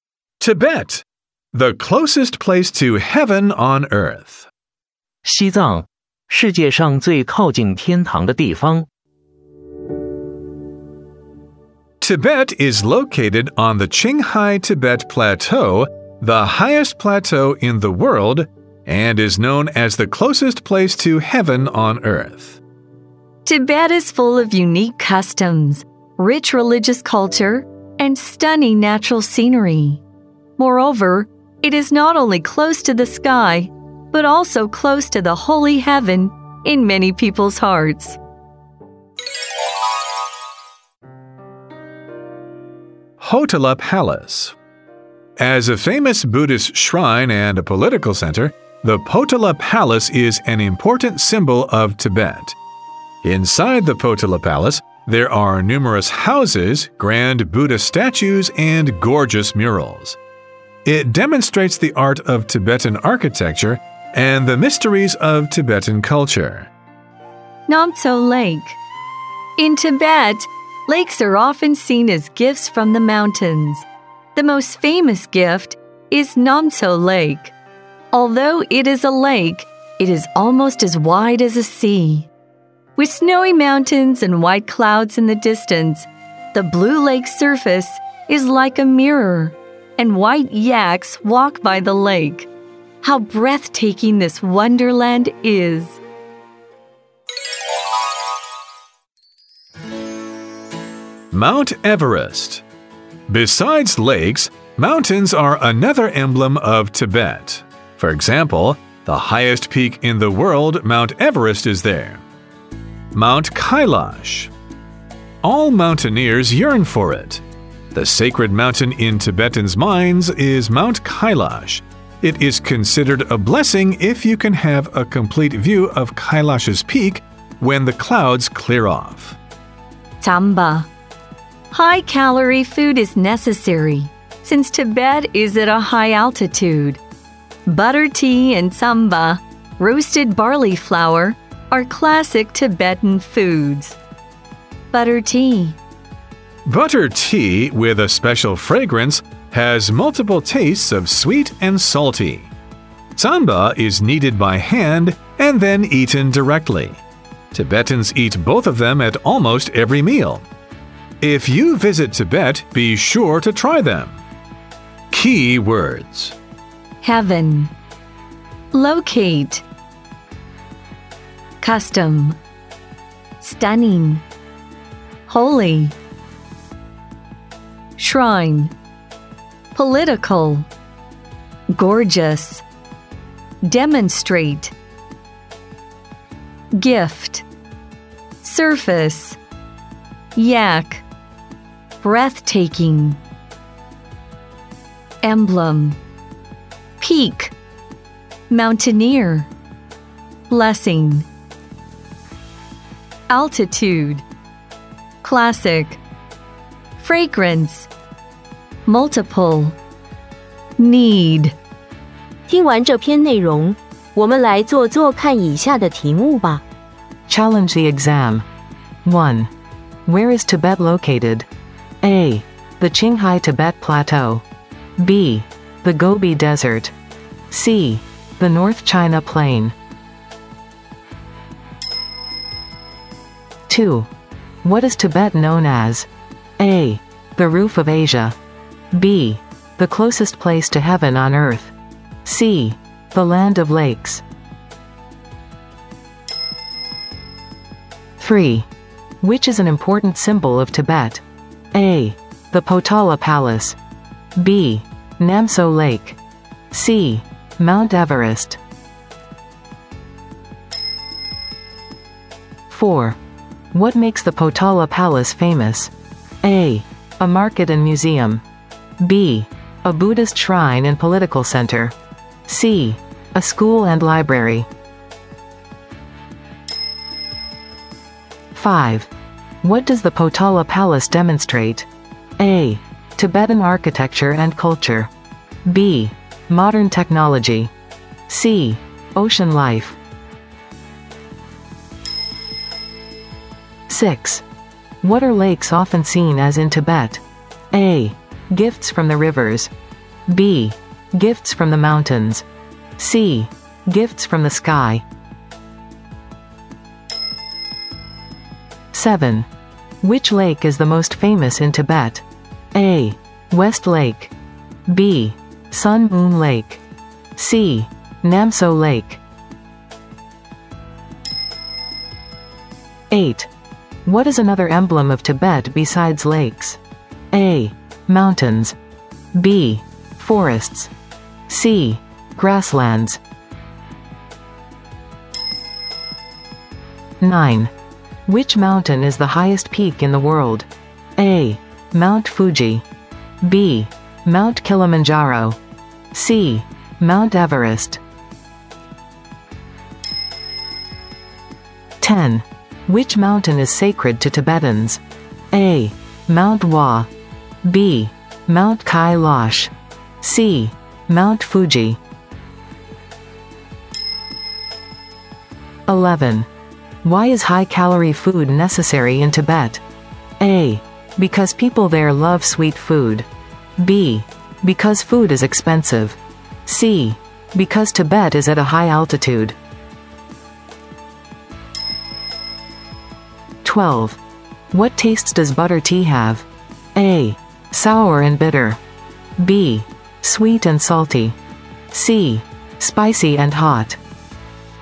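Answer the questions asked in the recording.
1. A: The Qinghai-Tibet Plateau.
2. B: The closest place to heaven on earth.
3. A: The Potala Palace.
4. B: A Buddhist shrine and political center.
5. A: Tibetan architecture and culture.
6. B: Gifts from the mountains.
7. C: Namso Lake.
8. A: Mountains.
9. C: Mount Everest.
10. B: Mount Kailash.
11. C: Because Tibet is at a high altitude.
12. B: Sweet and salty.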